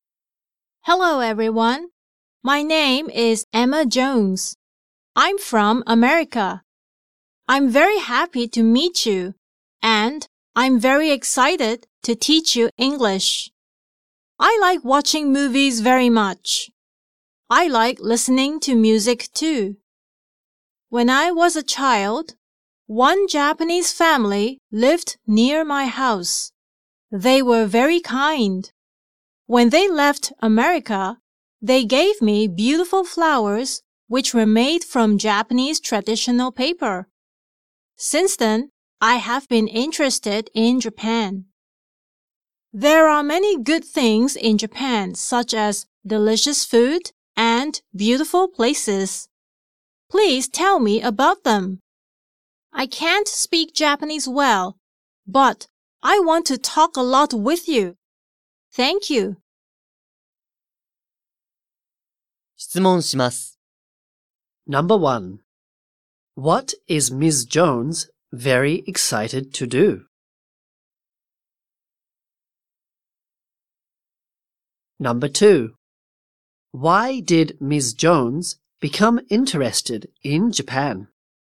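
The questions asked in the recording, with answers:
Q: What is Ms. Jones very excited to do?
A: To teach English.

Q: Why did Ms. Jones become interested in Japan?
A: Because a kind Japanese family who lived near her gave her beautiful flowers made from Japanese traditional paper.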